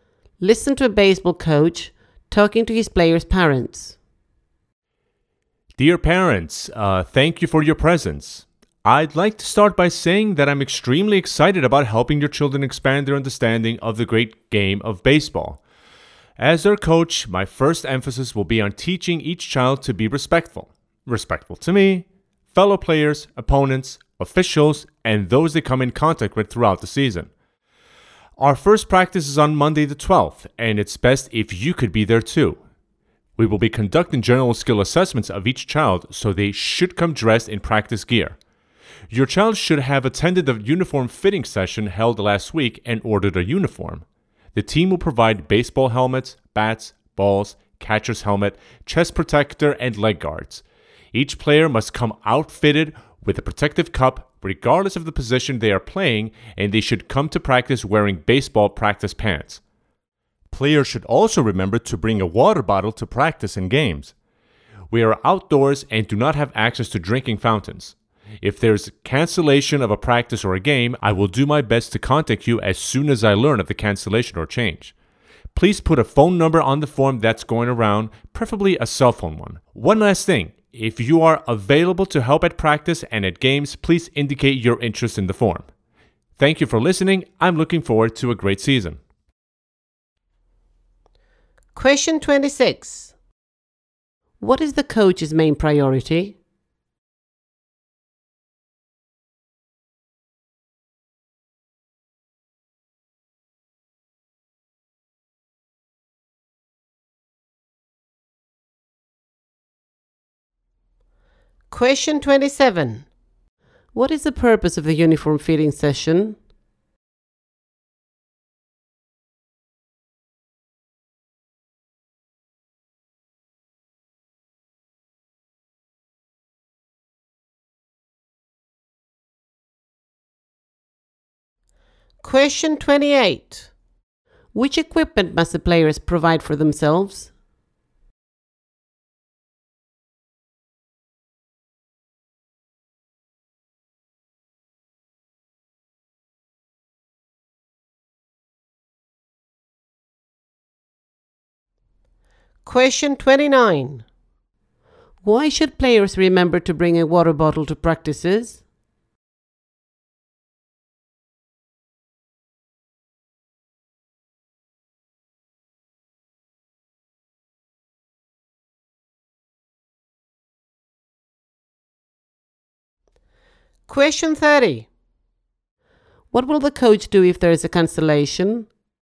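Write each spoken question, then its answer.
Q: What is the coach's main priority?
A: Teaching each child to be respectful

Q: Which equipment must the players provide for themselves?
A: A protective cup and baseball practice pants

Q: Why should players remember to bring a water bottle to practices?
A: They are outdoors with no drinking fountains

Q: What will the coach do if there is a cancellation?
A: Contact the parents as soon as he learns of it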